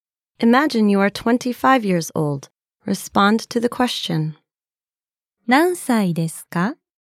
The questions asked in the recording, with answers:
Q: 何歳ですか?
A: 25歳です。